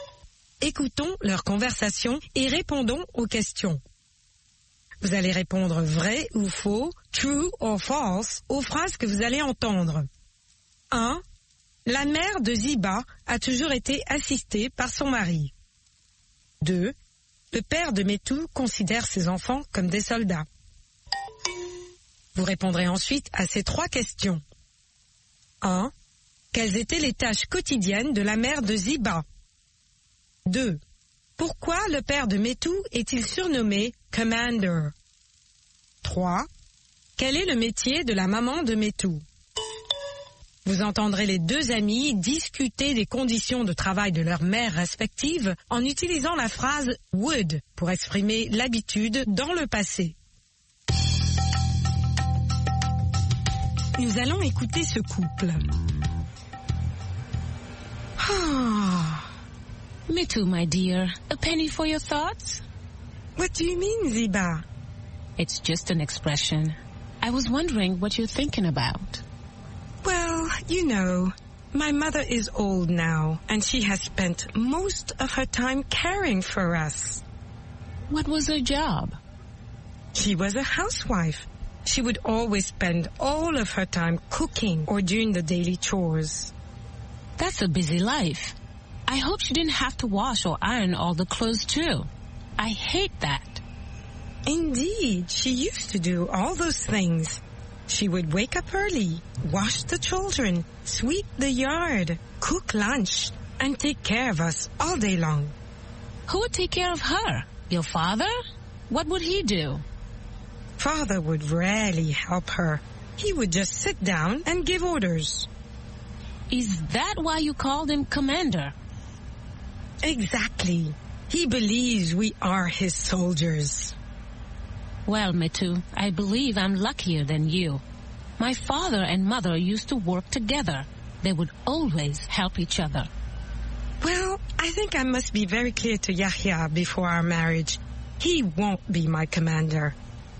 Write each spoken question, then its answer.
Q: La mère de Ziba a toujours été assistée par son mari.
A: L'énoncé 1 est vrai.

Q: Pourquoi le père de Metou est-il surnommé « Commander »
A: Parce qu'il ne faisait que donner des ordres.

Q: Quel est le métier de la maman de Metou?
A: Elle est femme au foyer.